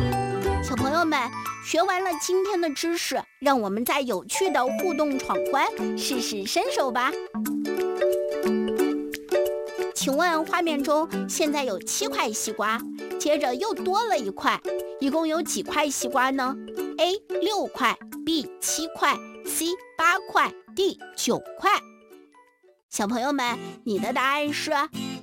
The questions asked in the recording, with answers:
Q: 请问画面中现在有七块西瓜,接着又多了一块,一共有几块西瓜呢?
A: 答案就是 C 八块西瓜